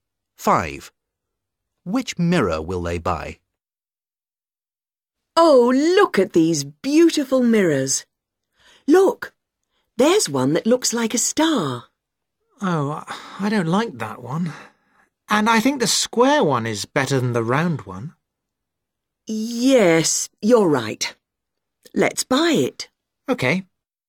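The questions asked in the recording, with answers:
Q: Which mirror will they buy?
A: the square one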